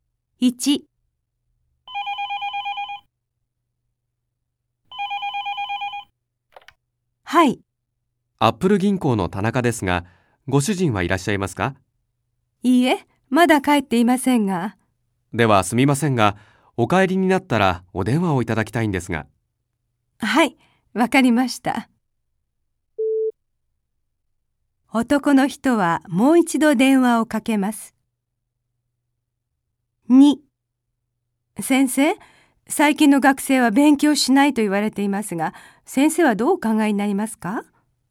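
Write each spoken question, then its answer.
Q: 男の人はもう一度電話をかけます。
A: いいえ(男の人ではなく、ご主人が電話をかけます)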